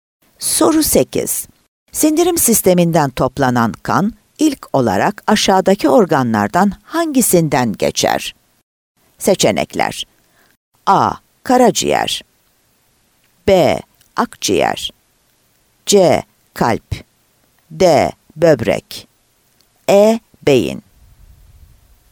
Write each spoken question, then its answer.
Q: Sindirim sisteminden toplanan kan ilk olarak aşağıdaki organlardan hangisinden geçer?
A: Adana